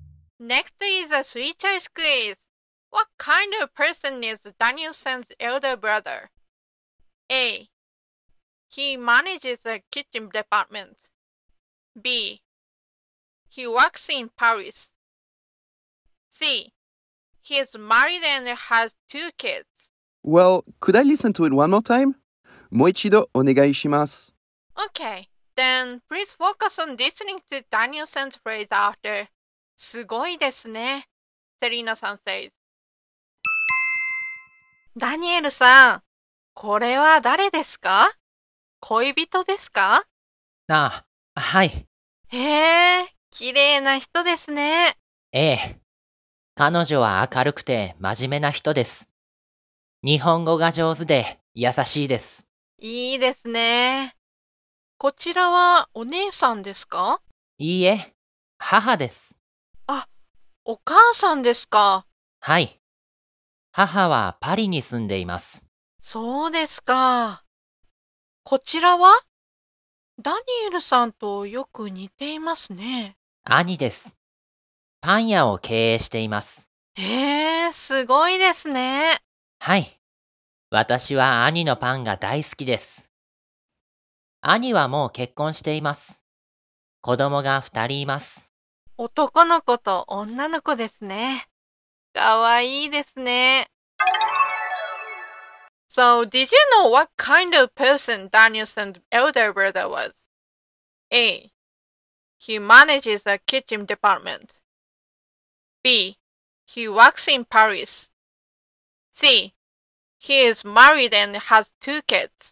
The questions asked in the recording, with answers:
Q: What kind of person is Danielle-san's elder brother?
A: So the answer is C.